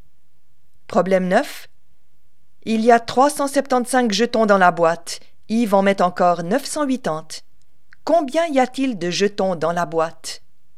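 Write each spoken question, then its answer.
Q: Combien y a-t-il de jetons dans la boîte?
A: 1355 jetons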